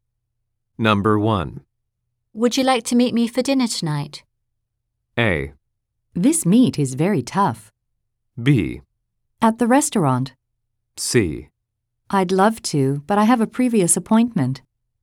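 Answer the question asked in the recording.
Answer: C: I'd love to, but I have a previous appointment.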